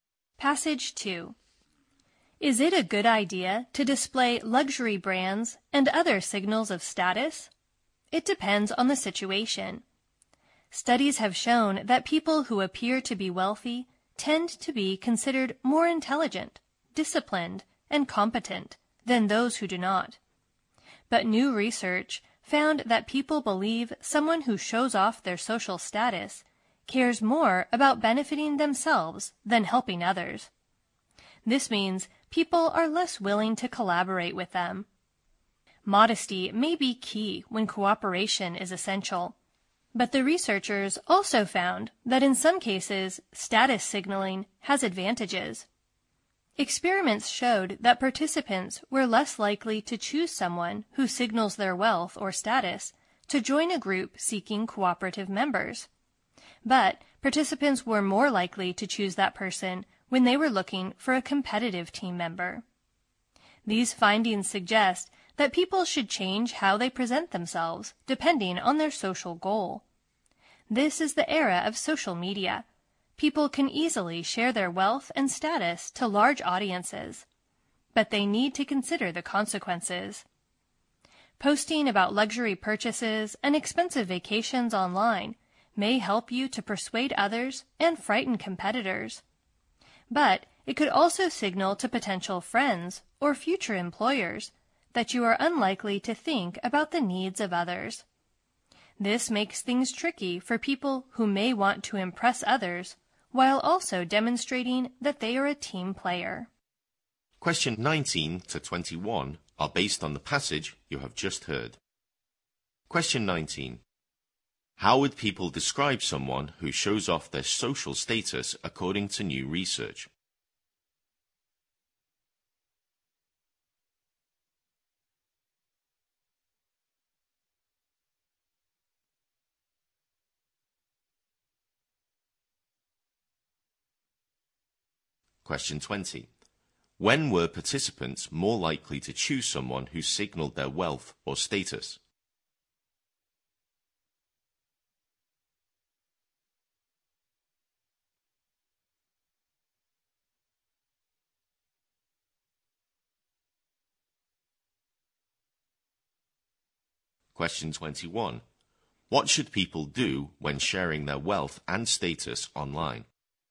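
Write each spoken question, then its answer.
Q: How would people describe someone who shows off their social status according to new research?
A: As caring more about helping themselves than helping others

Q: When were participants more likely to choose someone who signaled their wealth or status?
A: When they wanted a competitive team member

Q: What should people do when sharing their wealth and status online?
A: Think about the consequences.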